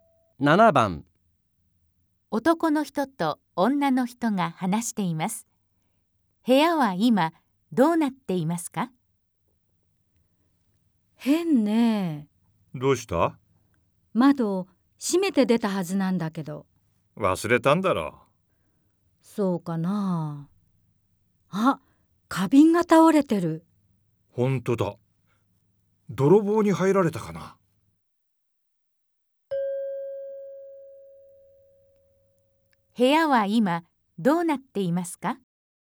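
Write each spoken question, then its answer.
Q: 部屋は今どうなっていますか?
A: 窓が開いていて、花瓶が倒れている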